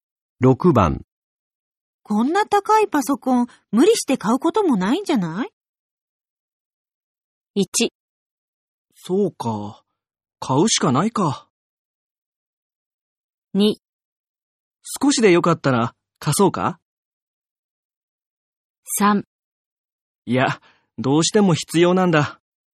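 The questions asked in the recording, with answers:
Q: こんな高いパソコン、無理して買うこともないんじゃない?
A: 3: いや、どうしても必要なんだ。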